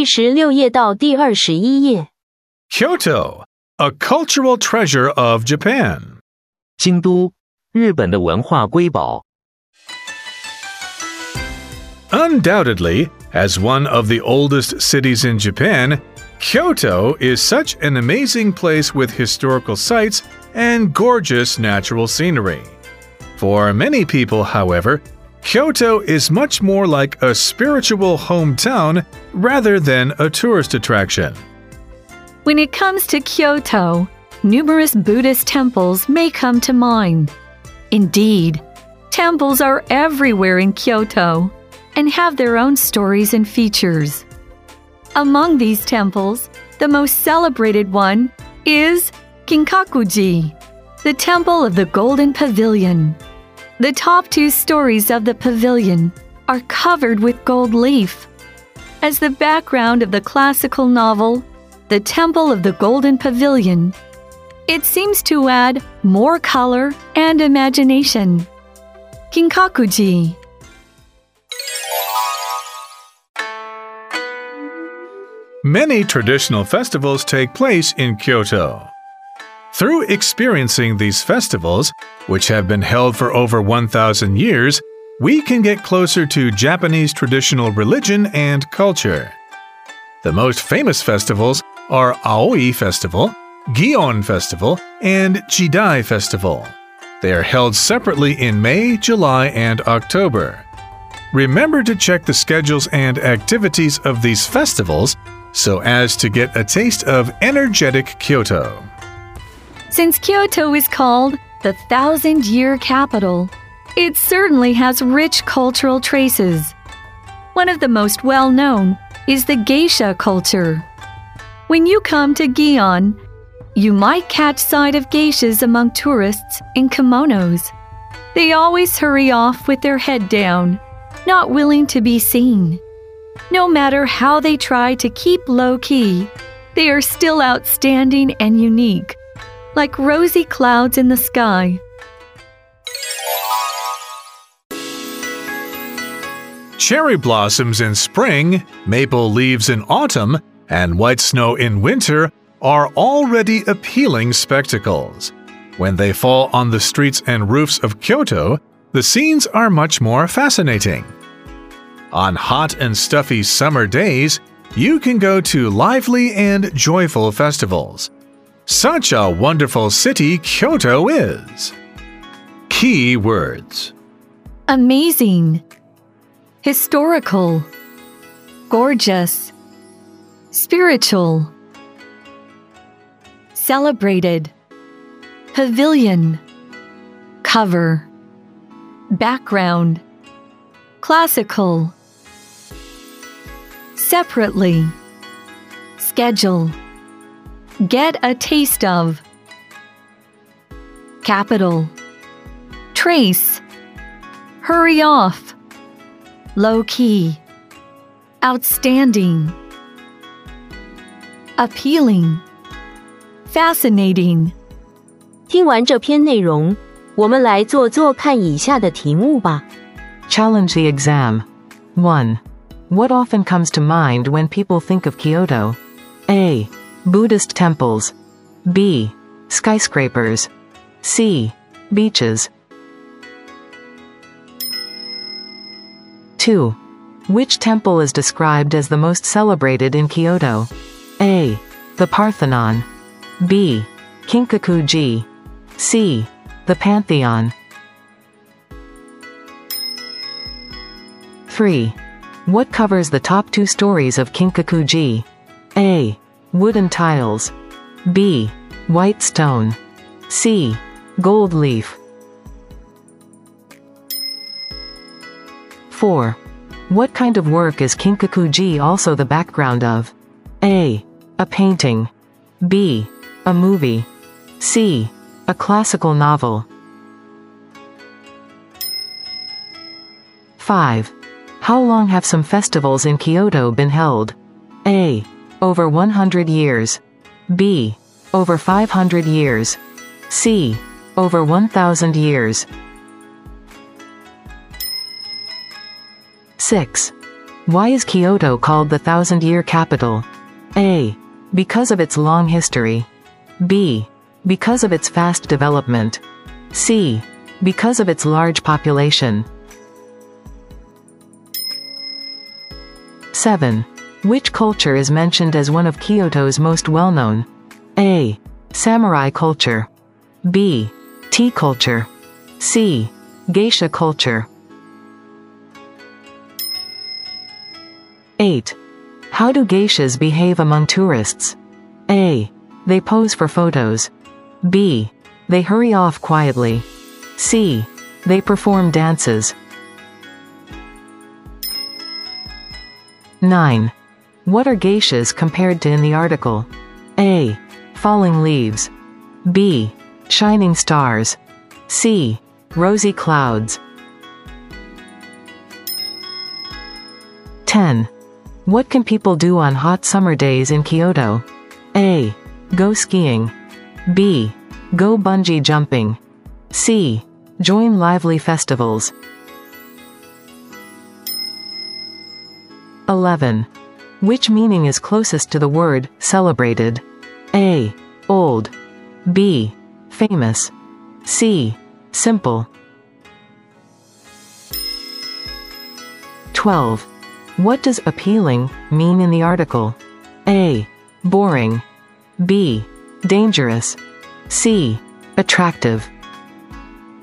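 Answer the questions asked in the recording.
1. A: Buddhist temples.
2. B: Ginkaku-ji.
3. C: Gold leaf.
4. C: A classical novel.
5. C: Over 1,000 years.
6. A: Because of its long history.
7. C: Geisha culture.
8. B: They hurry off quietly.
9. C: Rosy clouds.
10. C: Join lively festivals.
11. B: Famous.
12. C: Attractive.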